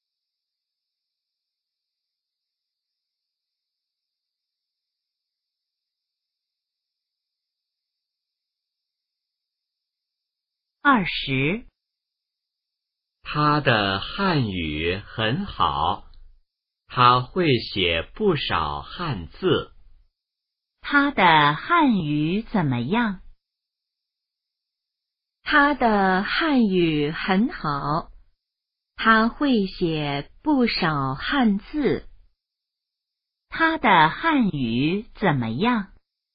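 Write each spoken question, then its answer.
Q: 他的汉语怎么样?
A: 很好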